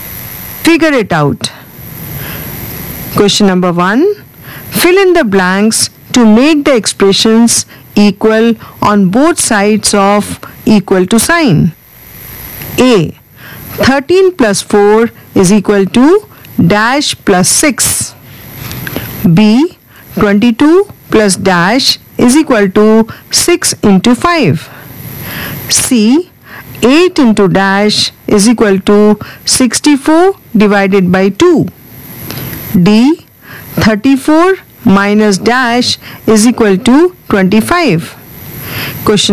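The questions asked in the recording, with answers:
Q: A. 13 plus 4 is equal to dash plus 6.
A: 11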